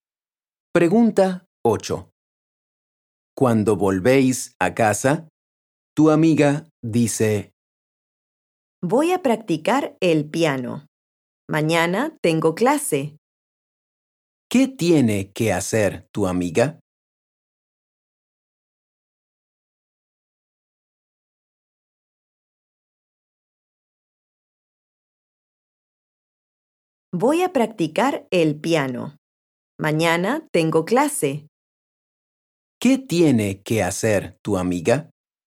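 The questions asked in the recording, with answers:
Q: ¿Qué tiene que hacer tu amiga?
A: practicar el piano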